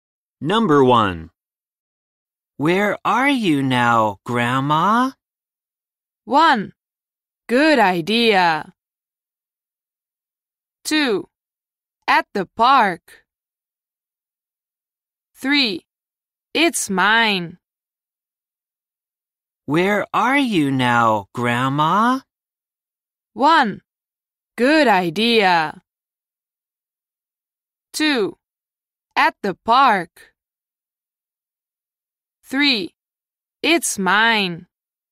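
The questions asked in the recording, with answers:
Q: Where are you now, Grandma?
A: 2: At the park.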